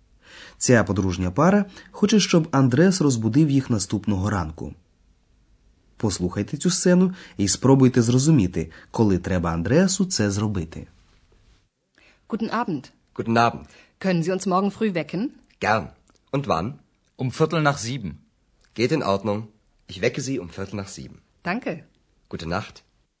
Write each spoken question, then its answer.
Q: Послухайте цю сцену і спробуйте зрозуміти, коли треба Андреасу це зробити.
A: Андреас повинен розбудити їх о фіртель чверті нах зібен після сьомої, тобто о сьомій п'ятнадцять.